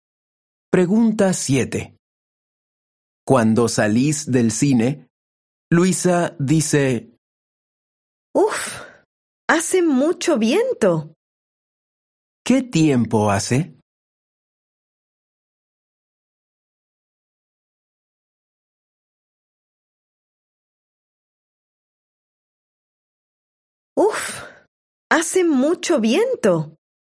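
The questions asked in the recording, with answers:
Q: ¿Qué tiempo hace?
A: hace mucho viento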